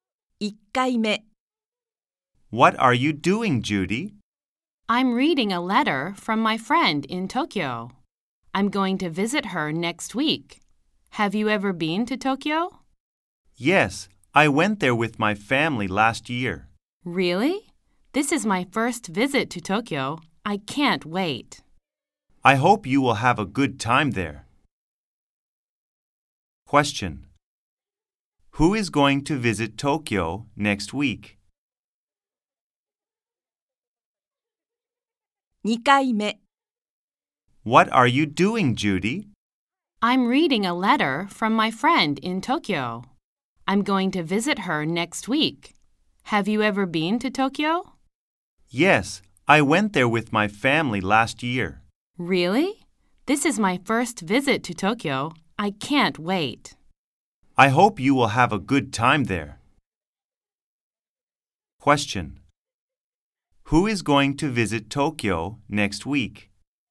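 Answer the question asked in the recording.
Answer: Judy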